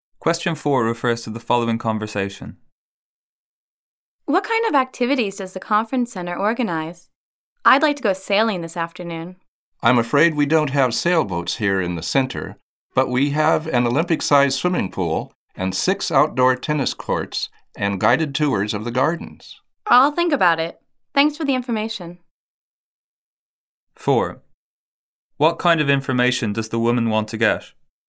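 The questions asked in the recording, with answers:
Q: What kind of information does the woman want to get?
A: Information about the activities the conference center organizes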